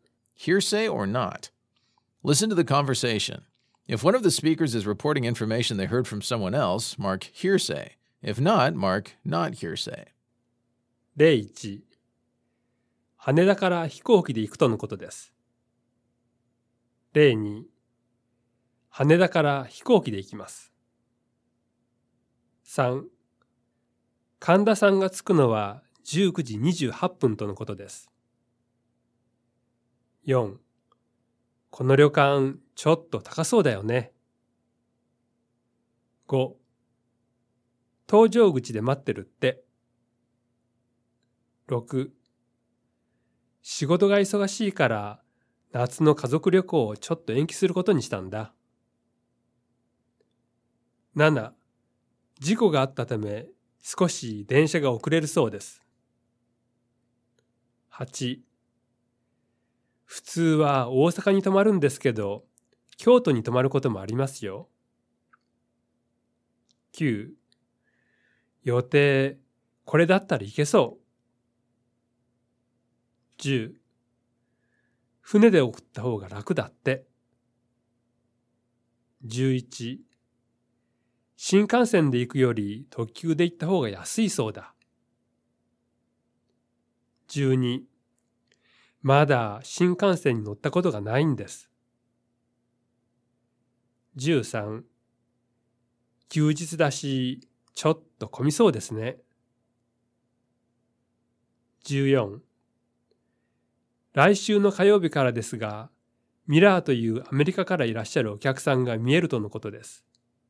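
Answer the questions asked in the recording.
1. Hearsay
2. Not hearsay
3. Hearsay
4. Not hearsay
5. Hearsay
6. Not hearsay
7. Hearsay
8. Not hearsay
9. Not hearsay
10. Hearsay
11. Hearsay
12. Not hearsay
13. Not hearsay
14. Hearsay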